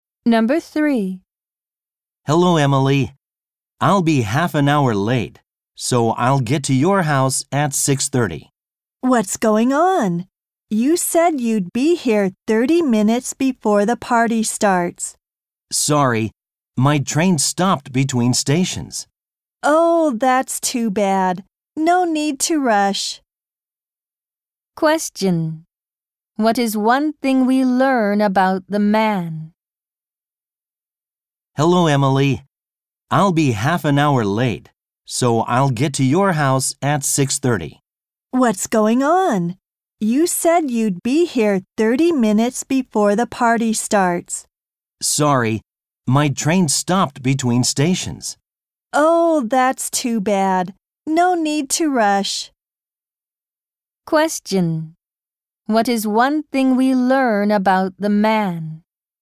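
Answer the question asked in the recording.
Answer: His train stopped between stations, so he will be half an hour late.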